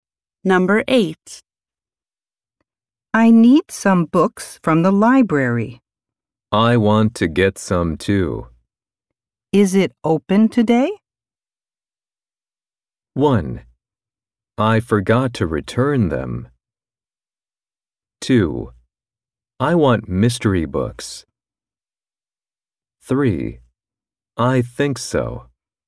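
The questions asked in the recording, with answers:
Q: Is it open today?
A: 3: I think so.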